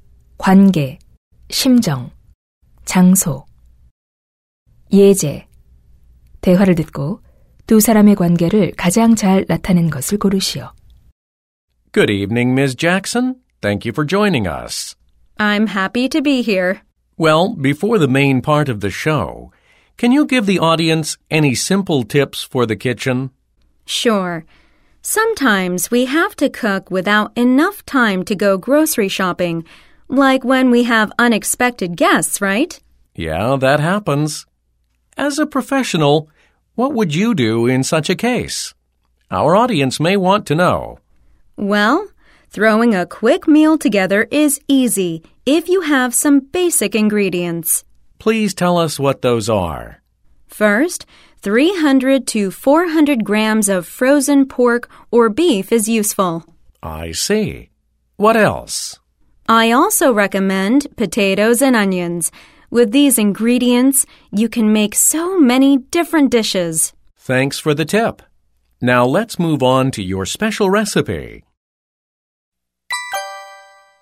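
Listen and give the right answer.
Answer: TV 쇼 진행자 - 요리 전문가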